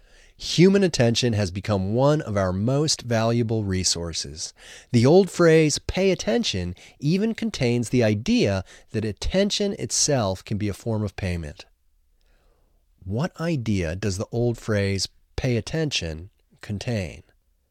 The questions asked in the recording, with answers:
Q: What idea does the old phrase, pay attention, contain?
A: The old phrase, pay attention, contains the idea that attention itself can be a form of payment.